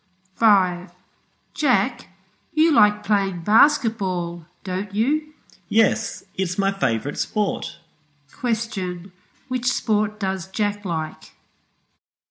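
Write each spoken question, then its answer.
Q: Which sport does Jack like?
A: Basketball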